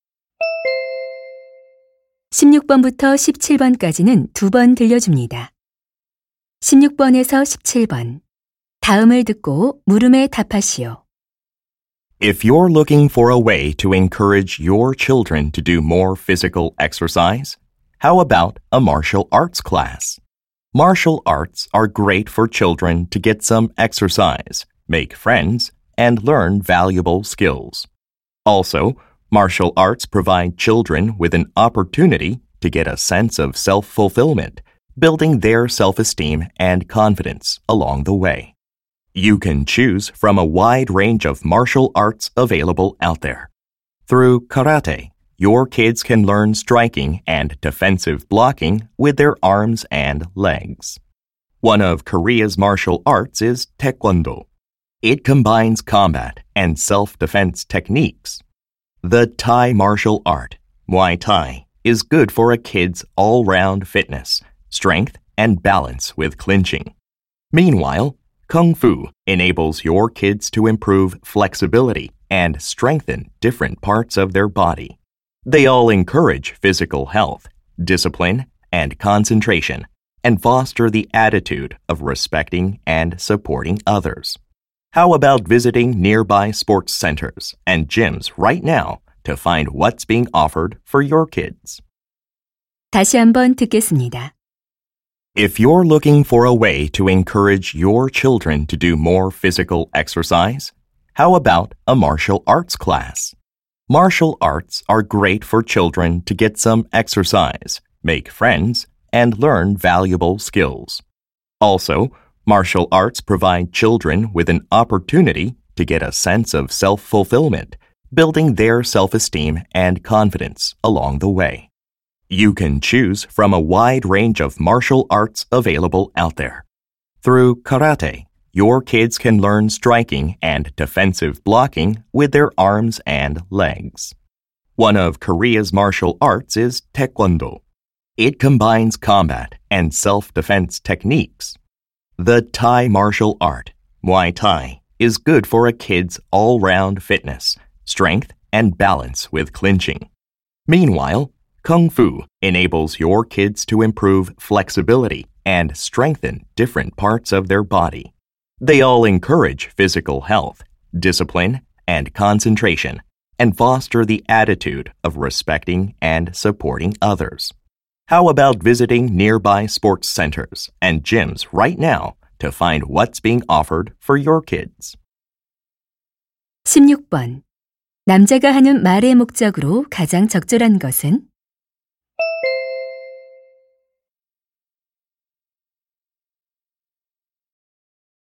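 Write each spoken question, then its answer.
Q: 남자가 하는 말의 목적으로 가장 적절한 것은?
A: 아이들에게 무술 수업을 권장하려고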